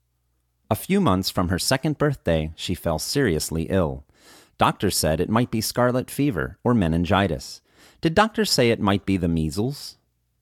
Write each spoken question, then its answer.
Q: Did doctors say it might be the measles?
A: No, doctors didn't say it might be the measles.